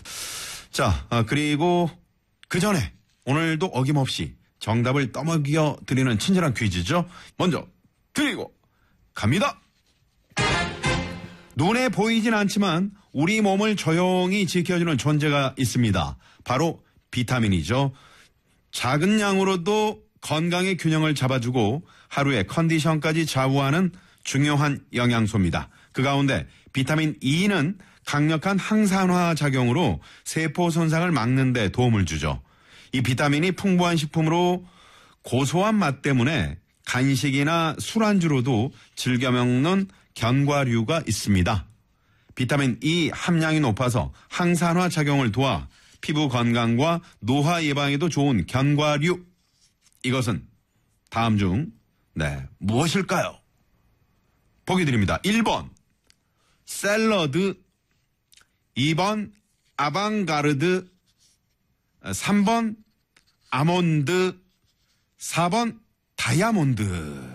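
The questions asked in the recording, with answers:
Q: 이것은 다음 중 네, 무엇일까요?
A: 3: 아몬드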